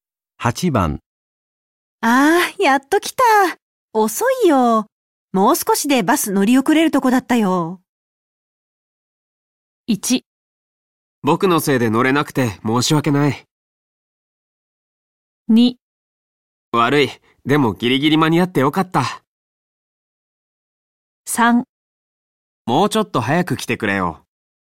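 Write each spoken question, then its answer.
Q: ああ、やっと来た。遅いよ。もう少しでバス乗り遅れるとこだったよ。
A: 2: 悪い。でもギリギリ間に合ってよかった。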